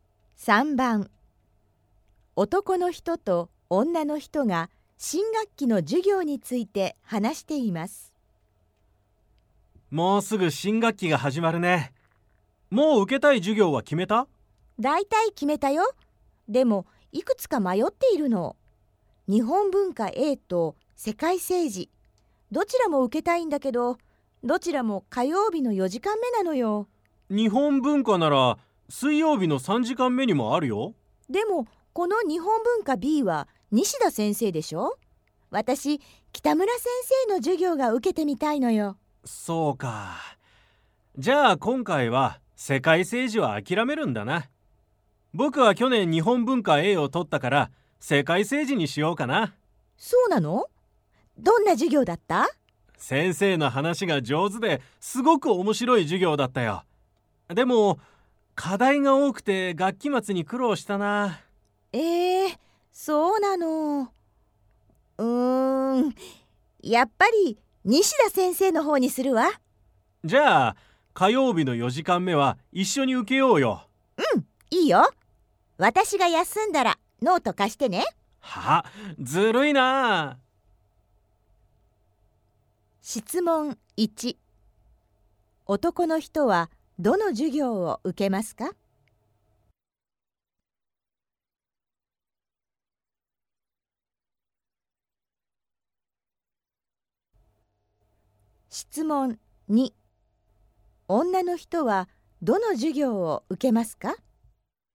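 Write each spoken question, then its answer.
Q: 男の人はどの授業を受けますか?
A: 世界政治(火曜日の4時間目)

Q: 女の人はどの授業を受けますか?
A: 世界政治(火曜日の4時間目)と日本文化B(水曜日の3時間目、西田先生)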